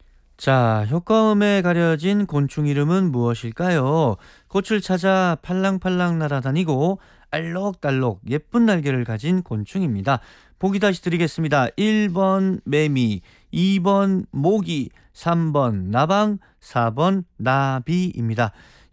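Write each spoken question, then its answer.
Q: 자, 효과음에 가려진 곤충 이름은 무엇일까요?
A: 4: 나비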